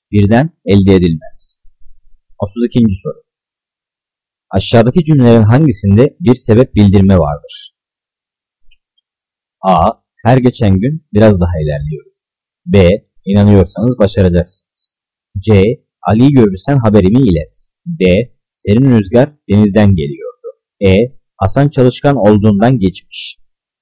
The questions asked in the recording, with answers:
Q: Aşağıdaki cümlelerin hangisinde bir sebep bildirme vardır?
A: Cevap E. Hasan çalışkan olduğundan geçmiş.